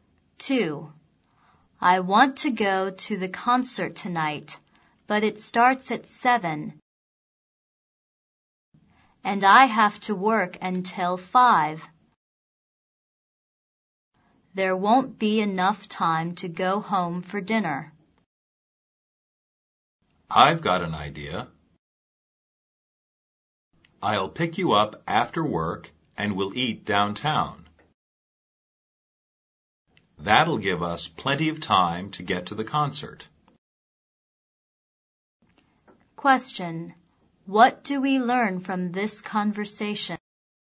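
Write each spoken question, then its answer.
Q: What do we learn from this conversation?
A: They will eat dinner downtown before the concert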